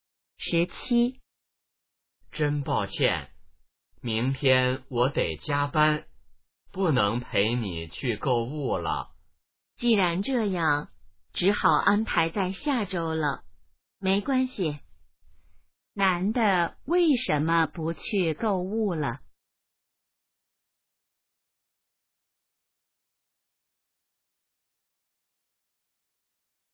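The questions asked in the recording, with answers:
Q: 男的为什么不去购物了?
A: 明天要加班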